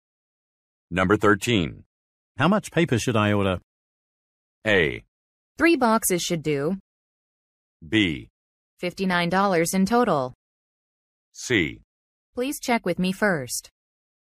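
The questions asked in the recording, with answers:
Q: How much paper should I order?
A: A: 3 boxes should do.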